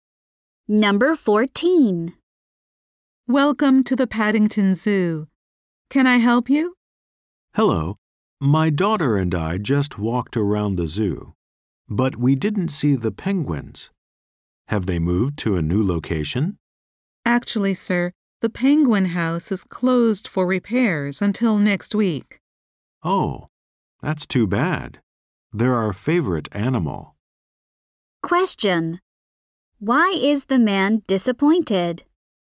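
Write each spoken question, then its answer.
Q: Why is the man disappointed?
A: The penguin house is closed for repairs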